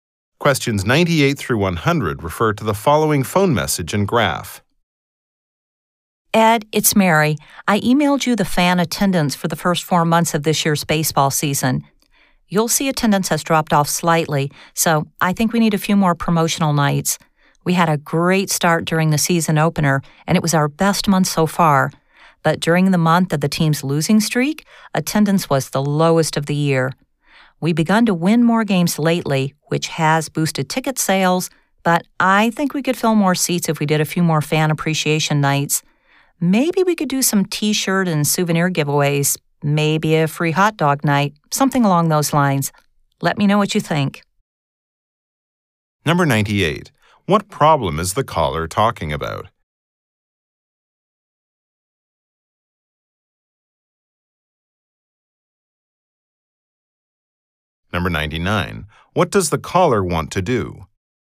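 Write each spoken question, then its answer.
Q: What problem is the caller talking about?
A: Fan attendance has dropped slightly

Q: What does the caller want to do?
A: Hold more promotional fan appreciation nights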